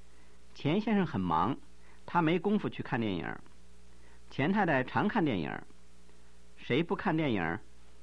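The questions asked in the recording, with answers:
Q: 谁不看电影?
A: 钱先生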